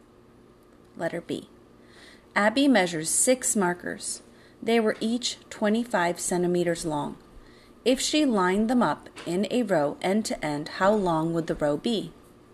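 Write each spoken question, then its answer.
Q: If she lined them up in a row end to end, how long would the row be?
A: 150 centimeters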